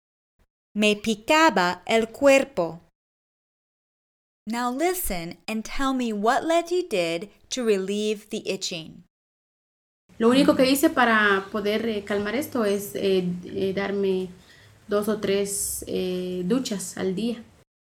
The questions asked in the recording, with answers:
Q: Now listen and tell me what Leti did to relieve the itching.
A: She took two or three showers a day.